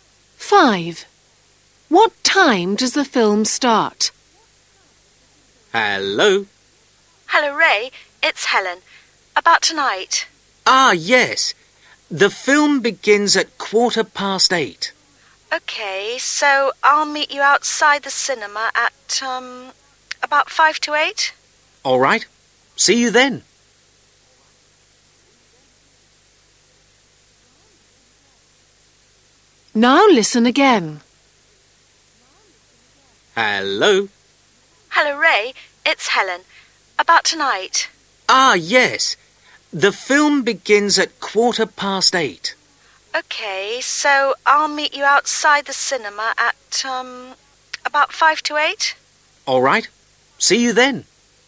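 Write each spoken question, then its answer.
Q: What time does the film start?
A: 8:15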